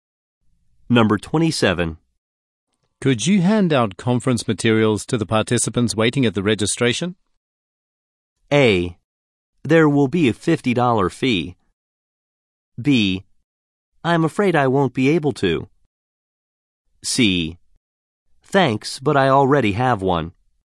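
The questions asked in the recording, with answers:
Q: Could you hand out conference materials to the participants waiting at the registration?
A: B: I'm afraid I won't be able to.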